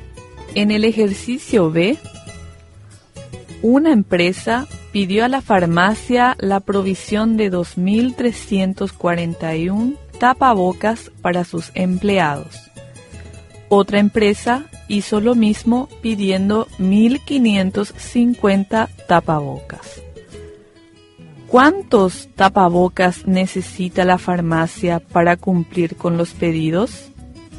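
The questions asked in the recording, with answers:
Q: ¿Cuántos tapabocas necesita la farmacia para cumplir con los pedidos?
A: 3.891 tapabocas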